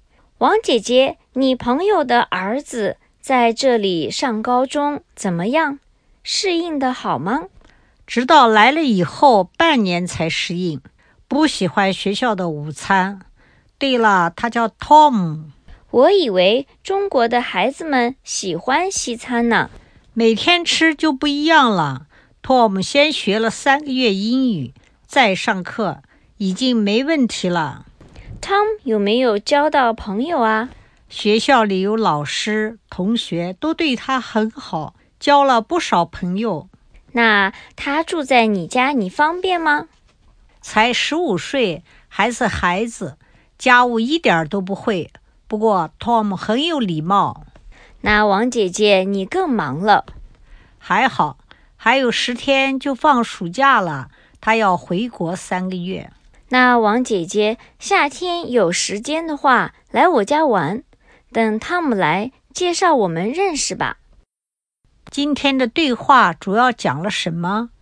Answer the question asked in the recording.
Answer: 还是讲王姐姐朋友的儿子来美国读高中,我们都成连续剧了。